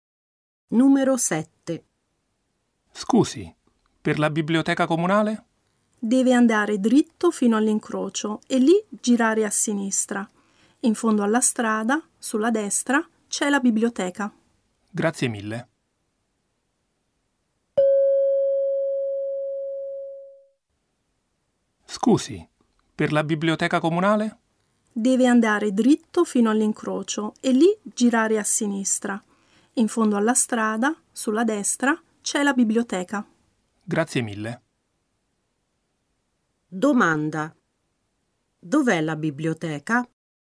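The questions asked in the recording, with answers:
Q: Dov'è la biblioteca?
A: Dritto fino all'incrocio, poi a sinistra; in fondo alla strada sulla destra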